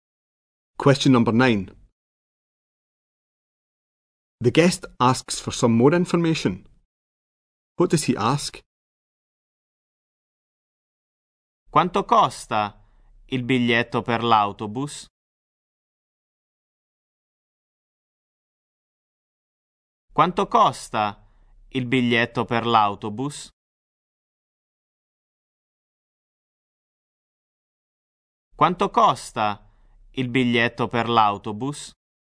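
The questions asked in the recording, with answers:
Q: What does he ask?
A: How much the bus ticket costs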